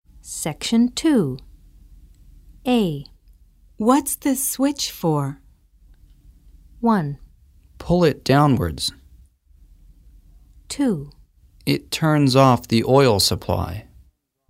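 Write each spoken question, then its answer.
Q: What's the switch for?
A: 2: It turns off the oil supply.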